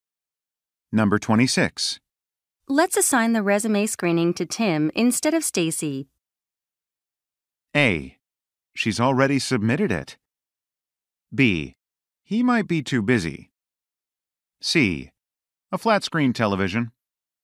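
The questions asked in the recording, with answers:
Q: Let's assign the resume screening to Tim instead of Stacy.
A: B: He might be too busy.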